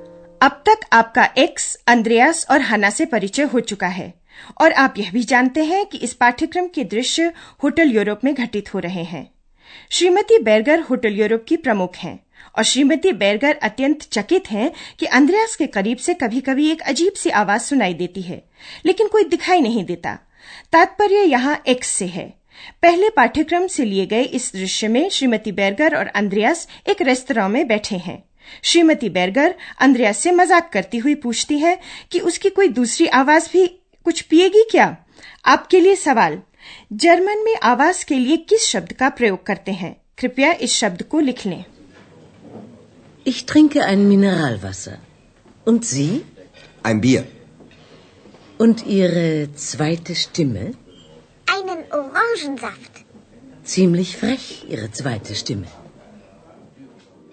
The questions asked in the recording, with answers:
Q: German में आवाज के लिए किस शब्द का प्रयोग करते हैं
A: स्टिमे